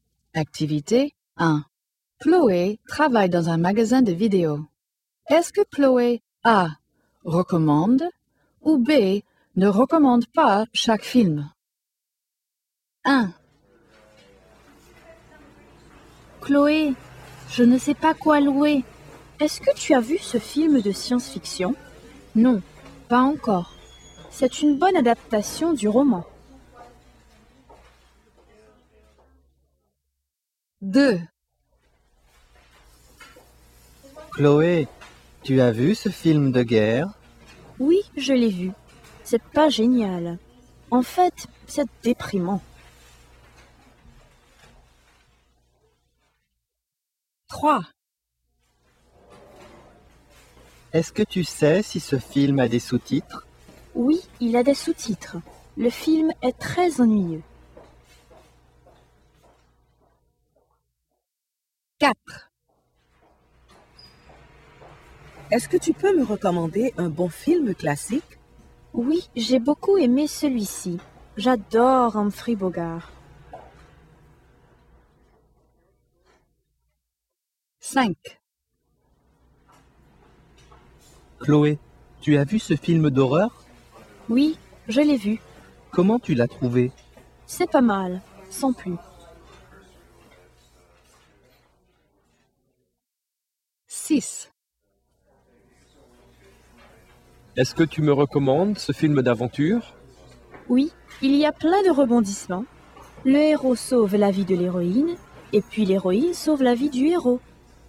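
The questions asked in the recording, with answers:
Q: Est-ce que Chloé A. recommande ou B. ne recommande pas chaque film?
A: B: ne recommande pas

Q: Est-ce que Chloé A. recommande ou B. ne recommande pas chaque film?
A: B: ne recommande pas

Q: Est-ce que Chloé A. recommande ou B. ne recommande pas chaque film?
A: A: recommande

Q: Est-ce que Chloé A. recommande ou B. ne recommande pas chaque film?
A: A: recommande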